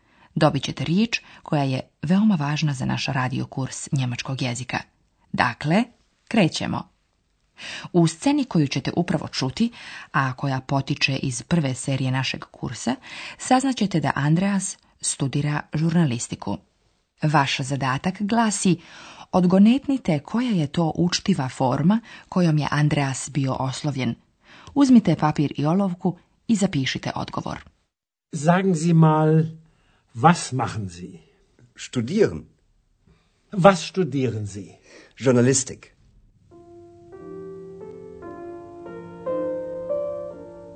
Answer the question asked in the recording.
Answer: Odgovor glasi zi, vi.